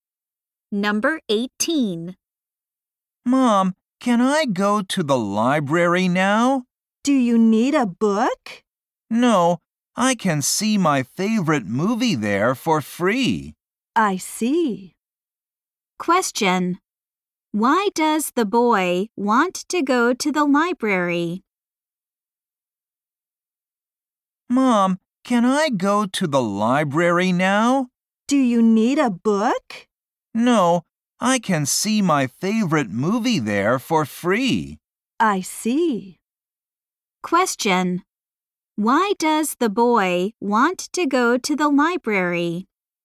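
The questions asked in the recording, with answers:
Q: Why does the boy want to go to the library?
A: To watch his favorite movie for free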